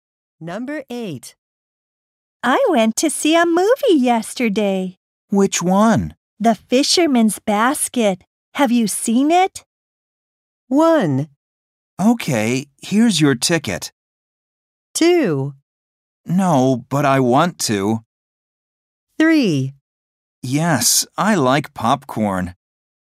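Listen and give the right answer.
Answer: 2: No, but I want to.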